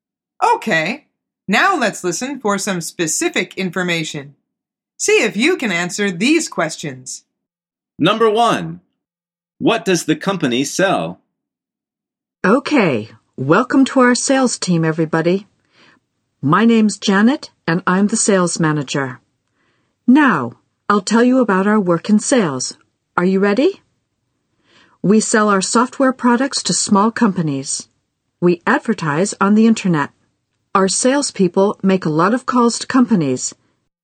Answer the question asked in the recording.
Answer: The answer is software products.